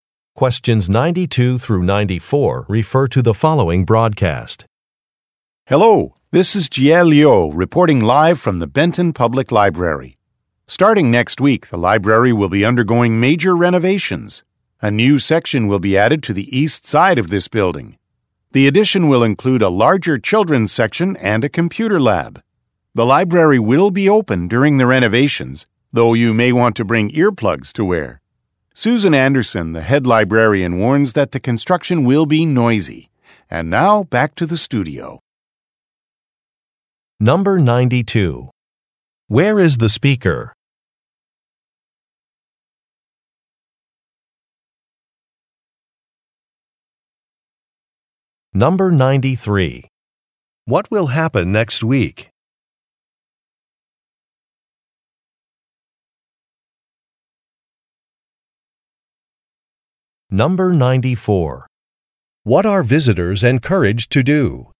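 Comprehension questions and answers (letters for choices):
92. Where is the speaker?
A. At a public library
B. At a history museum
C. At a community center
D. At a sports arena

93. What will happen next week?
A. A new exhibit will be set up.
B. A fund-raiser will take place.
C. A local election will be held.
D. A construction project will begin.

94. What are visitors encouraged to do?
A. Park on a side street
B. Wear ear protection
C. Donate money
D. Take photographs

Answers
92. A
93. D
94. B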